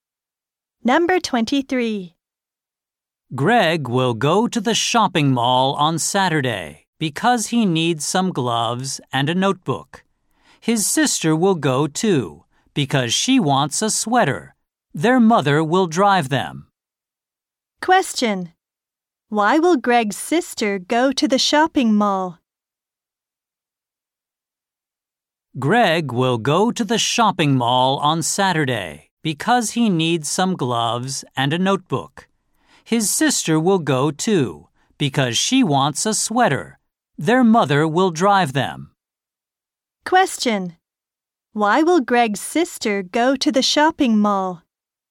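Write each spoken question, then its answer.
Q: Why will Greg's sister go to the shopping mall?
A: She wants a sweater.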